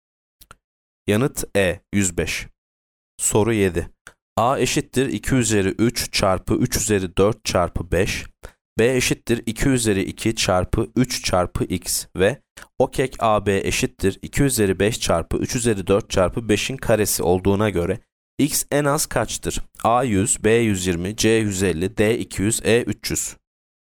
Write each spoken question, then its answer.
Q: B eşittir 2 üzeri 2 çarpı 3 çarpı x ve OKEK AB eşittir 2 üzeri 5 çarpı 3 üzeri 4 çarpı 5'in karesi olduğuna göre x en az kaçtır?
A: Yanıt D 200.